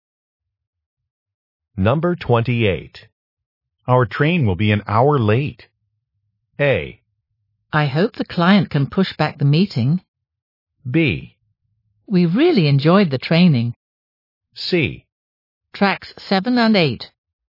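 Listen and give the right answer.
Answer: A: I hope the client can push back the meeting.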